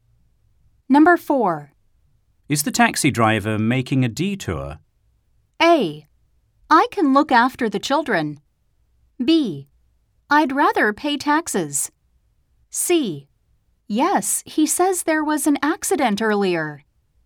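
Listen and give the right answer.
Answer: C: Yes, he says there was an accident earlier.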